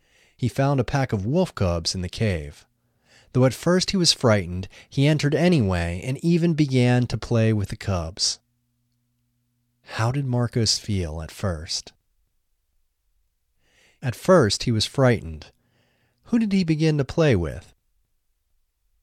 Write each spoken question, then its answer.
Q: How did Marcos feel at first?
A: At first he was frightened.

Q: Who did he begin to play with?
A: He began to play with the cubs.